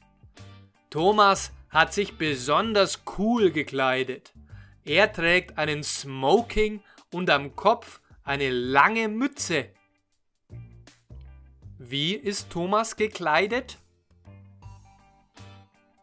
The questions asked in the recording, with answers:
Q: Wie ist Thomas gekleidet?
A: besonders cool. Thomas ist besonders cool gekleidet.